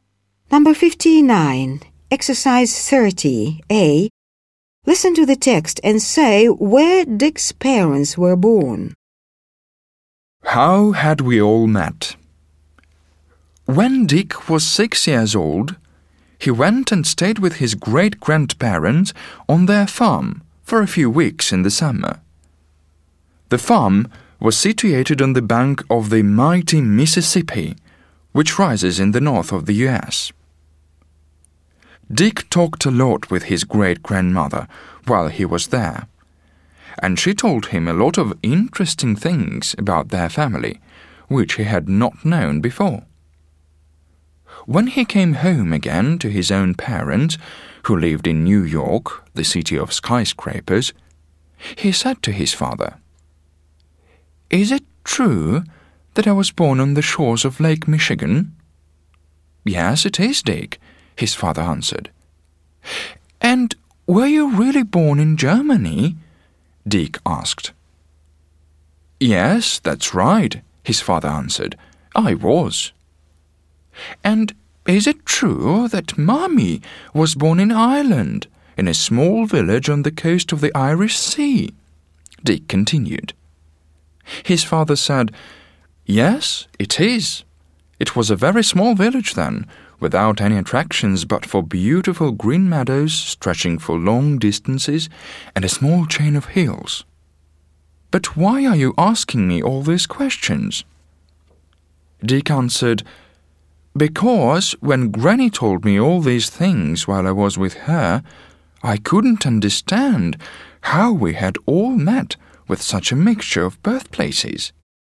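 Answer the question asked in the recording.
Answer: His father was born in Germany and his mother in Ireland, in a small village on the coast of the Irish Sea.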